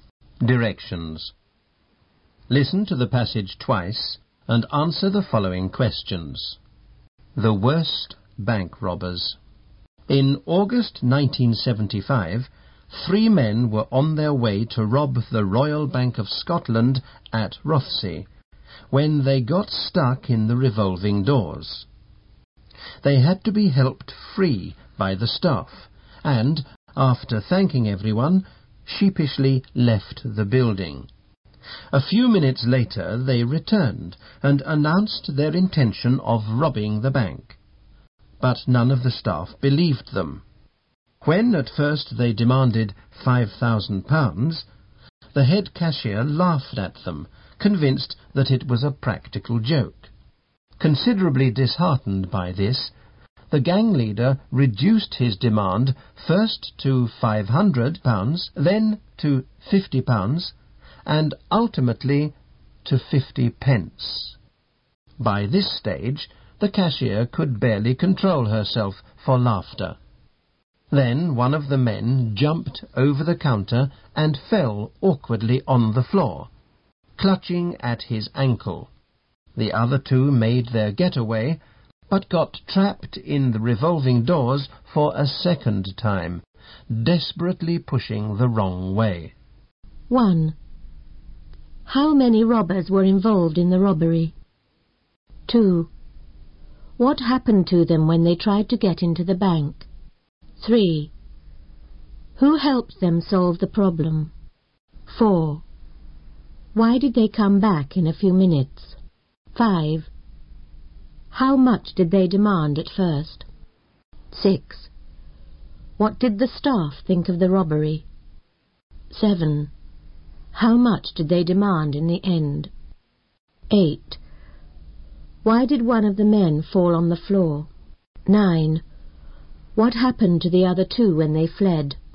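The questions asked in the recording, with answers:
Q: How many robbers were involved in the robbery?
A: Three.

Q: What happened to them when they tried to get into the bank?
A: They got stuck in the revolving doors.

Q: Who helped them solve the problem?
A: The bank staff.

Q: Why did they come back in a few minutes?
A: To rob the bank.

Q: How much did they demand at first?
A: £5,000.

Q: What did the staff think of the robbery?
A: They thought it was a practical joke.

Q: How much did they demand in the end?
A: 50 pence.

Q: Why did one of the men fall on the floor?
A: He jumped over the counter and landed awkwardly.

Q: What happened to the other two when they fled?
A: They got trapped in the revolving doors again, pushing the wrong way.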